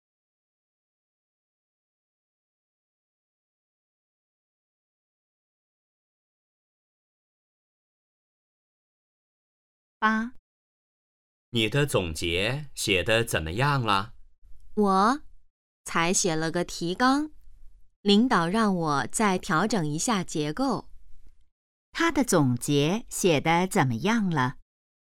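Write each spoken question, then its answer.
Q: 他的总结写得怎么样了?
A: 才写了个提纲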